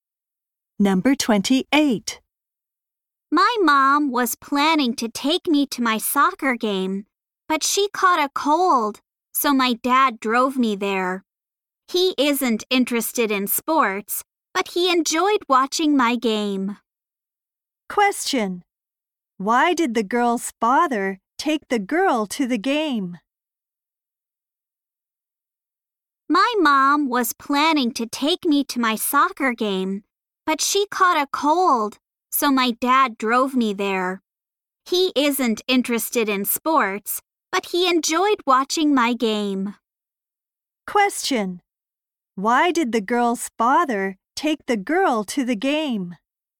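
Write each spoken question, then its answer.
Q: Why did the girl's father take the girl to the game?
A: Her mother caught a cold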